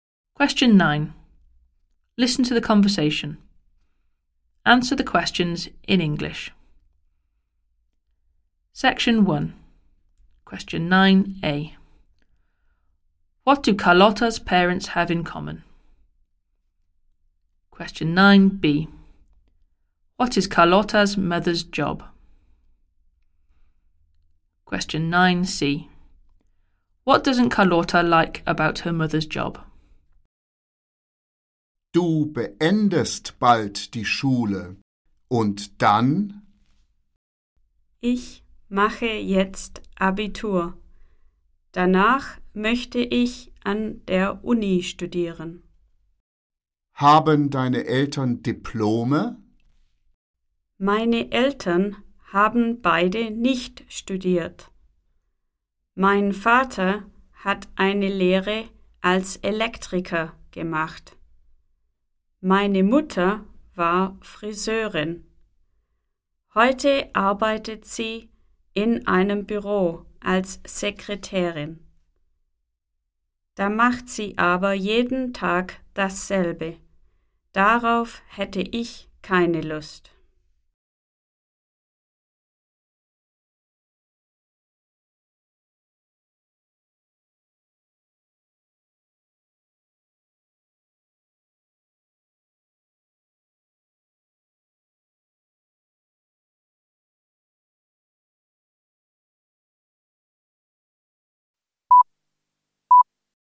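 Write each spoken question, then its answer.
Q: What do Carlotta's parents have in common?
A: Neither of them went to university

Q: What is Carlotta's mother's job?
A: Secretary in an office

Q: What doesn't Carlotta like about her mother's job?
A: She does the same thing every day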